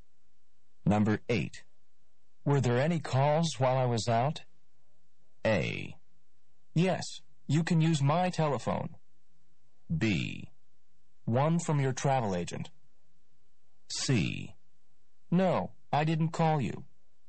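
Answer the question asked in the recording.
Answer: B: One from your travel agent.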